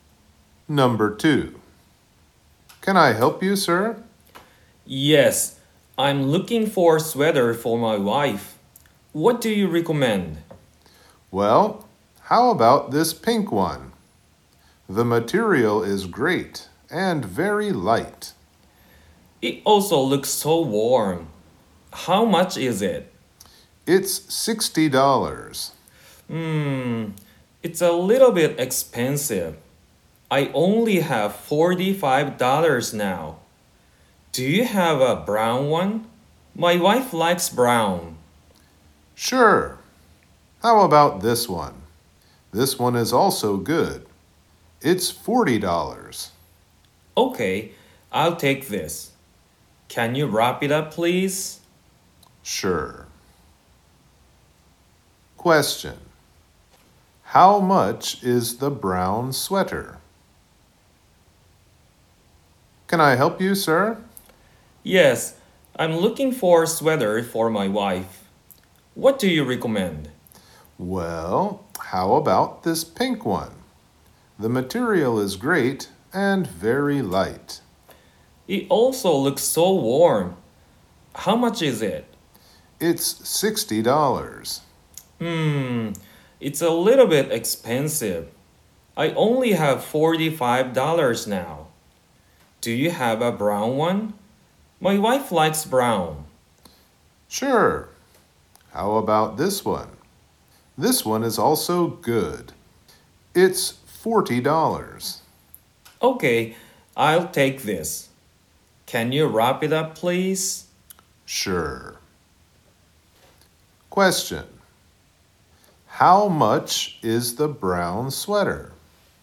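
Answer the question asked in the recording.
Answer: $40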